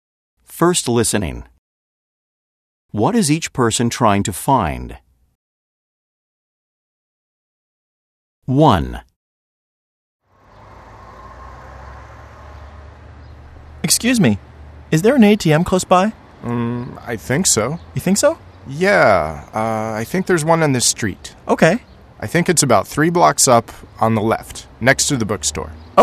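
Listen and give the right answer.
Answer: An ATM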